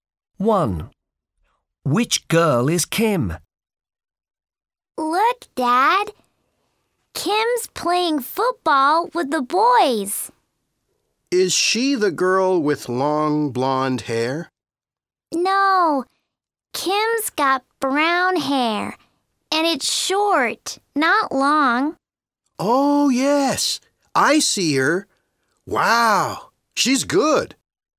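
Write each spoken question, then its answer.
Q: Which girl is Kim?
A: The girl with short brown hair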